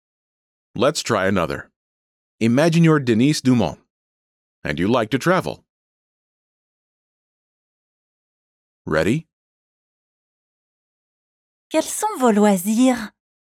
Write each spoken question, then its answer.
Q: Quels sont vos loisirs?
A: J'aime voyager.